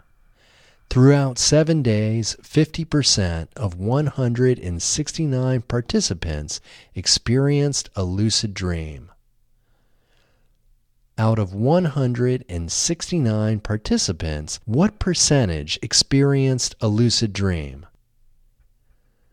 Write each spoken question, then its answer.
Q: Out of 169 participants, what percentage experienced a lucid dream?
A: Out of 169 participants, 50% experienced a lucid dream.